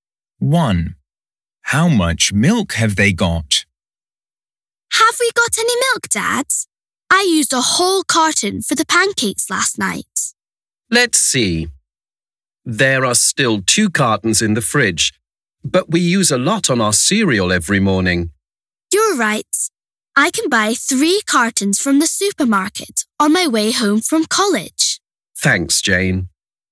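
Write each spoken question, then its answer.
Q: How much milk have they got?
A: 2 cartons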